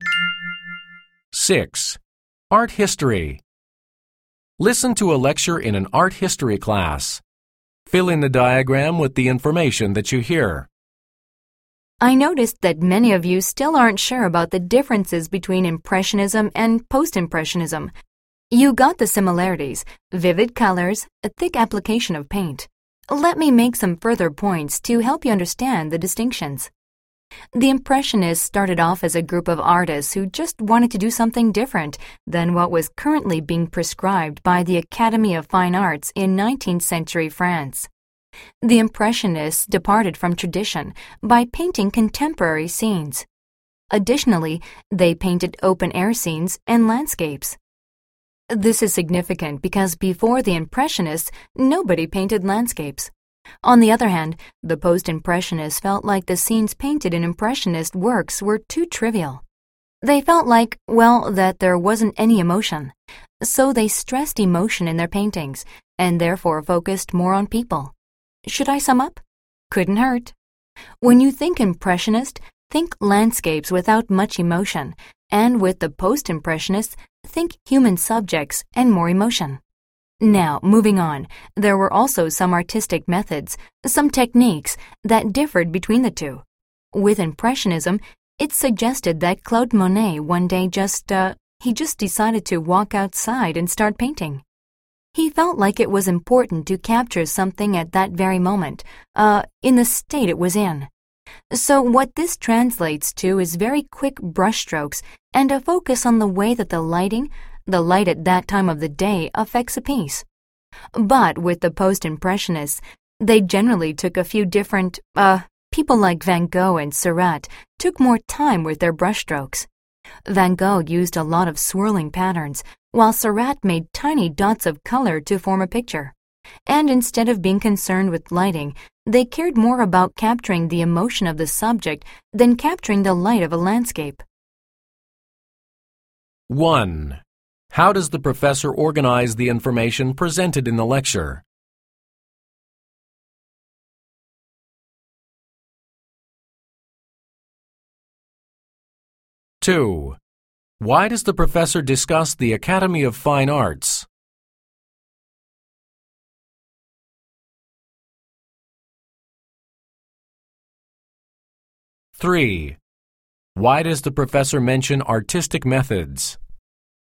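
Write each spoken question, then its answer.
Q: How does the professor organize the information presented in the lecture?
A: By comparing and contrasting Impressionism and Post-Impressionism

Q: Why does the professor discuss the Academy of Fine Arts?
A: To show that the Impressionists began by breaking away from what the Academy prescribed

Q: Why does the professor mention artistic methods?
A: To introduce another difference between Impressionism and Post-Impressionism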